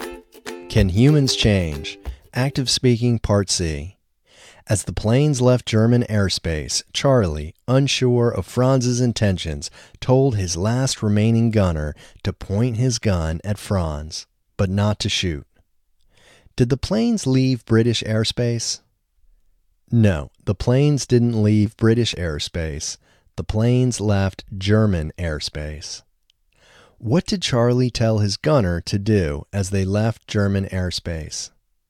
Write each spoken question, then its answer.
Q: What did Charlie tell his gunner to do as they left German airspace?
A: Charlie told his gunner to point his gun at Franz as they left German airspace.